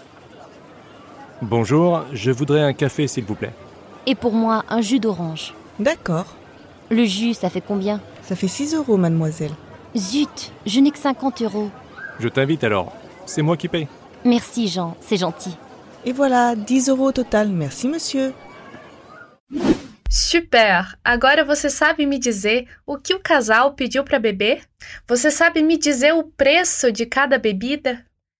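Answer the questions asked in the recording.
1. Um café e um suco de laranja
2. Suco de laranja 6 euros, café 4 euros (10 euros no total)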